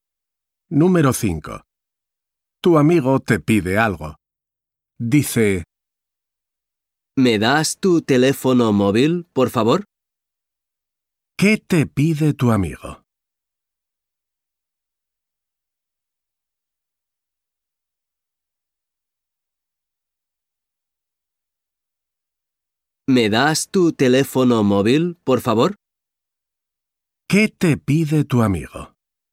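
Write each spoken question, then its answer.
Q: ¿Qué te pide tu amigo?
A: Tu teléfono móvil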